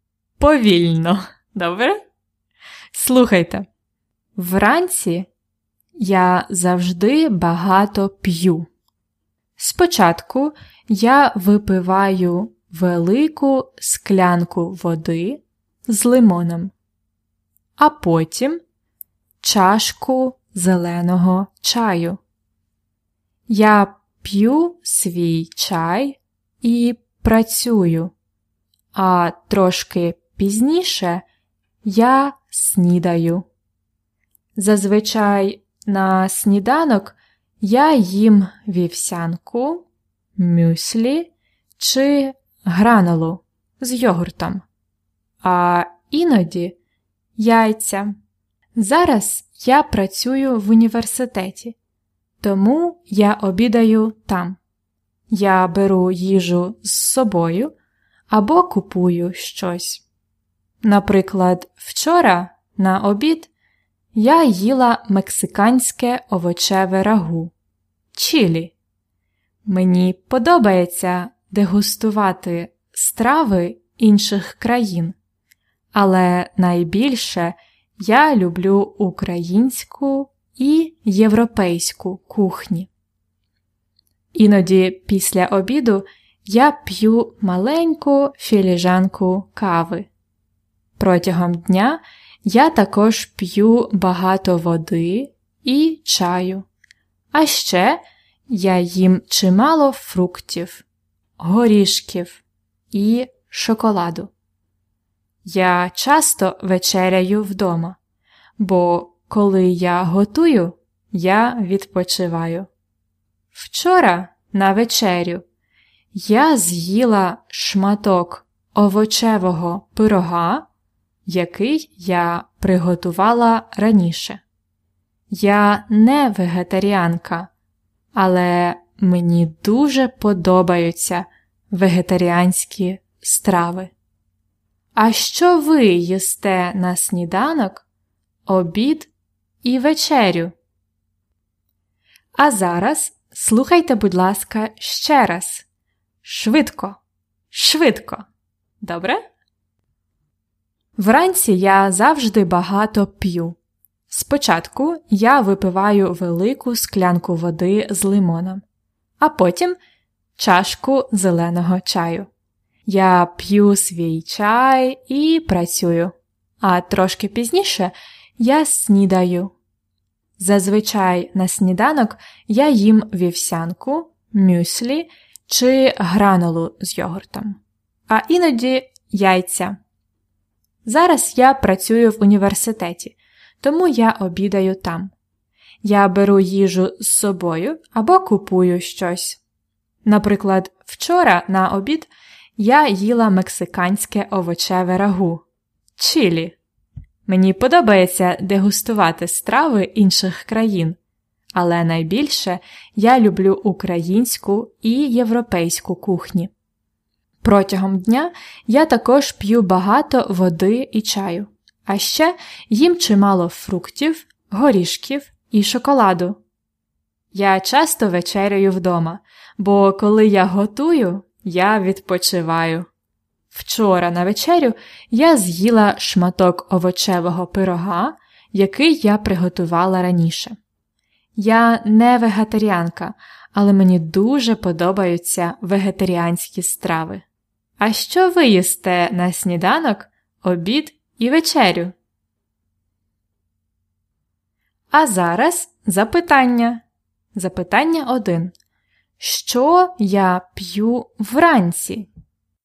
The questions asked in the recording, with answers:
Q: Що я п'ю вранці?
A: Ти п'єш велику склянку води з лимоном і чашку зеленого чаю.